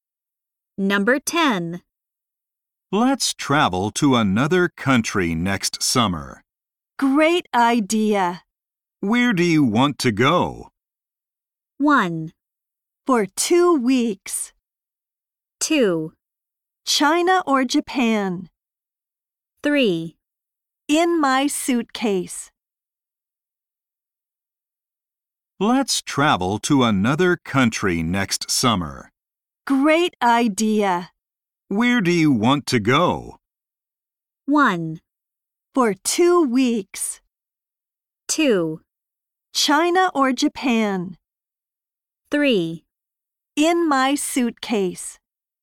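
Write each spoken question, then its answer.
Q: Where do you want to go?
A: 2: China or Japan?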